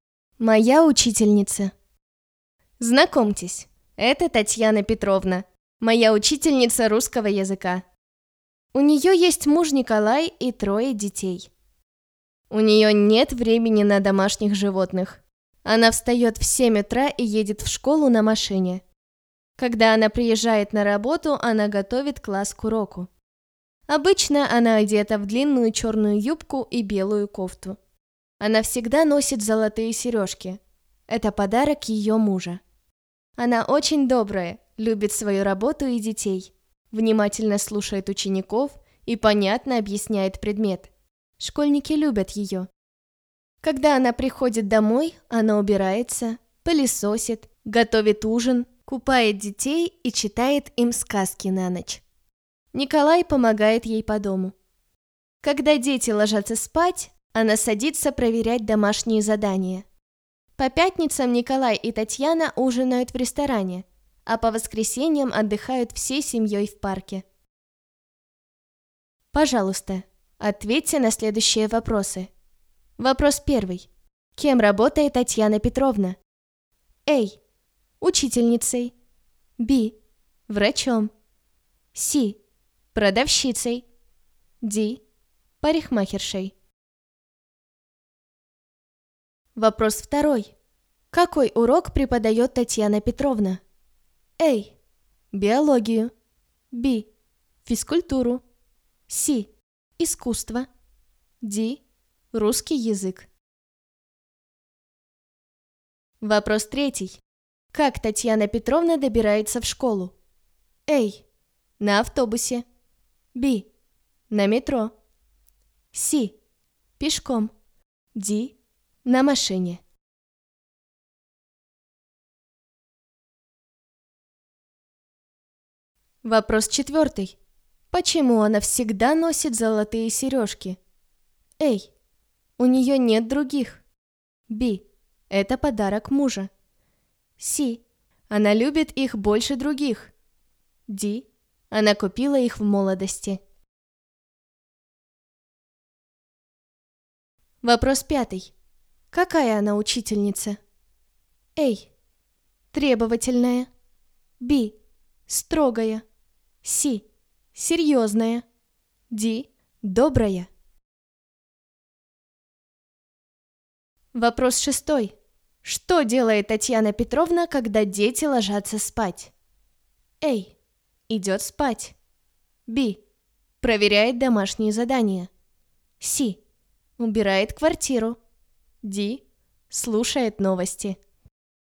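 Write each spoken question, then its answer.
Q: Кем работает Татьяна Петровна?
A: A: Учительницей

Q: Какой урок преподает Татьяна Петровна?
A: D: Русский язык

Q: Как Татьяна Петровна добирается в школу?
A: D: На машине

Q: Почему она всегда носит золотые сережки?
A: B: Это подарок мужа

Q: Какая она учительница?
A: D: Добрая

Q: Что делает Татьяна Петровна, когда дети ложатся спать?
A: B: Проверяет домашние задания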